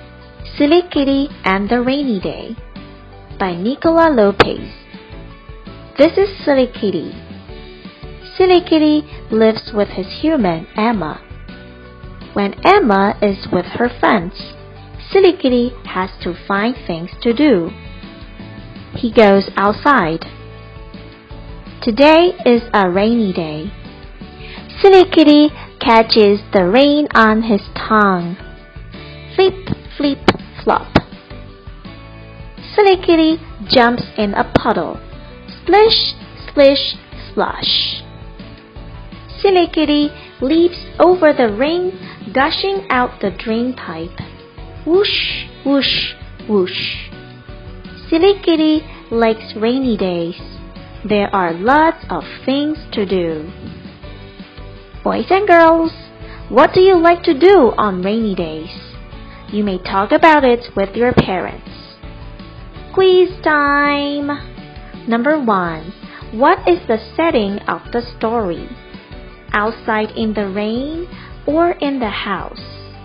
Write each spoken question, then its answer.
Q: What is the setting of the story? Outside in the rain or in the house?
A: The answer is outside in the rain.